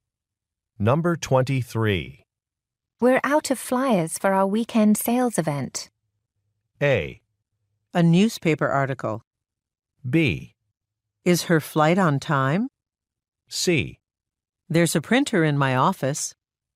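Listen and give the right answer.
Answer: C: There's a printer in my office.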